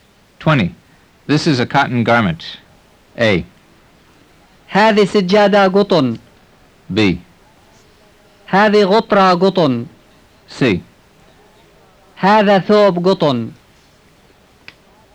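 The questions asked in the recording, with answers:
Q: This is a cotton garment.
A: C: هذا ثوب قطن.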